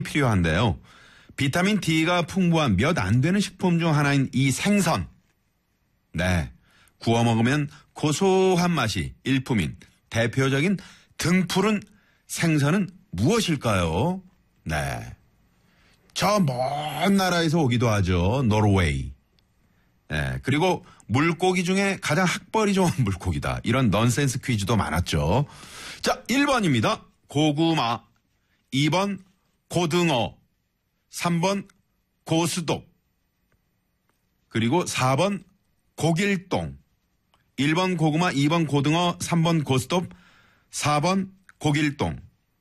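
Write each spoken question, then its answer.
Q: 구워 먹으면 고소한 맛이 일품인 대표적인 등푸른 생선은 무엇일까요?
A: 2: 고등어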